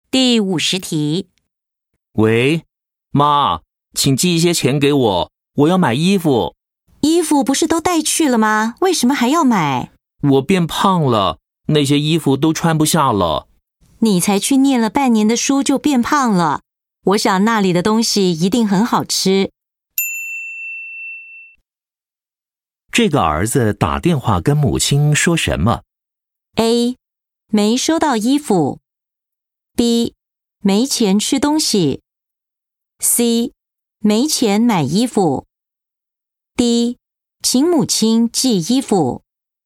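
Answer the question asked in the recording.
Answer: C: 没钱买衣服。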